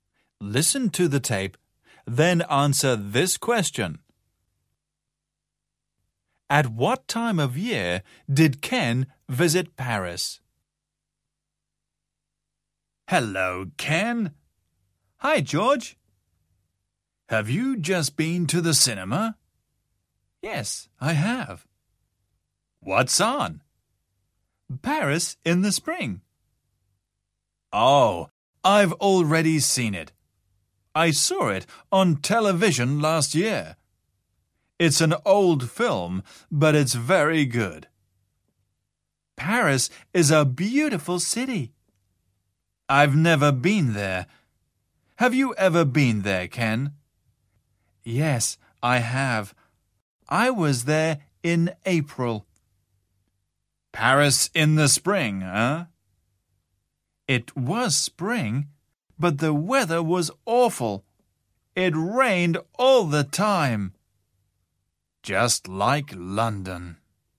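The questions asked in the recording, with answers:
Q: At what time of year did Ken visit Paris?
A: In the spring (in April)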